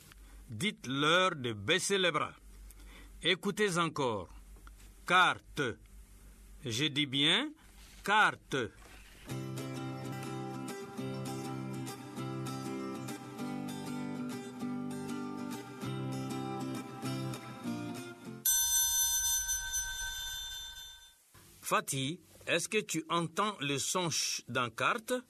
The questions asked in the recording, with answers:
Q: Fatih, est-ce que tu entends le son « ch » dans carte?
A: Non, monsieur. Dans carte, il n'y a pas le son « ch ».